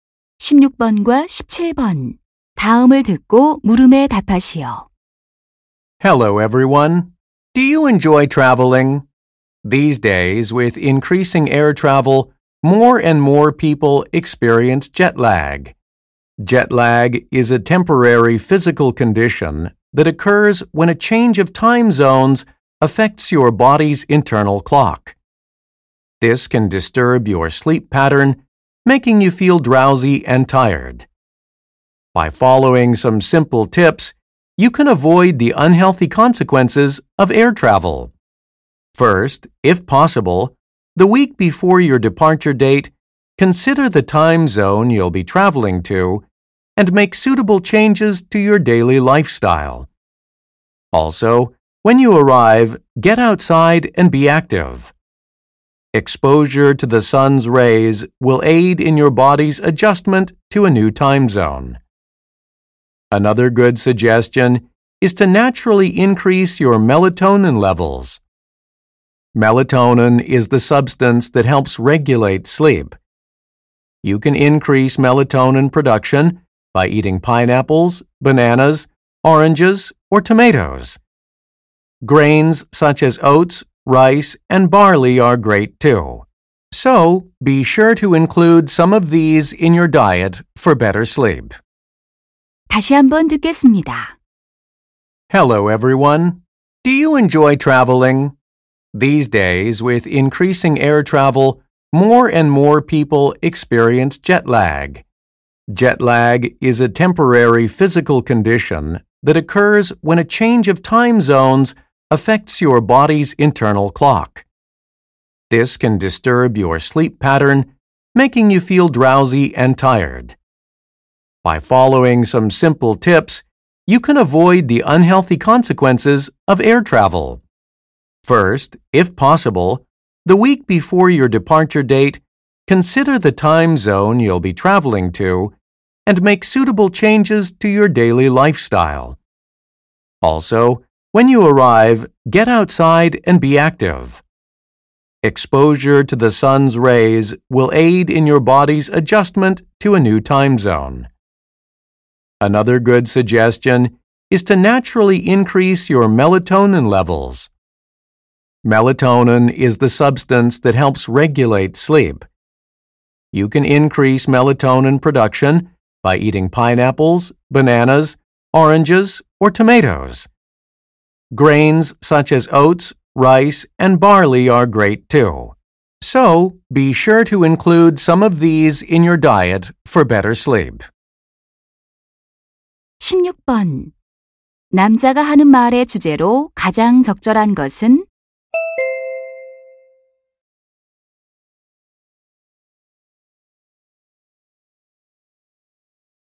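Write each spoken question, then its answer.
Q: 남자가 하는 말의 주제로 가장 적절한 것은?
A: 시차증을 피하는 방법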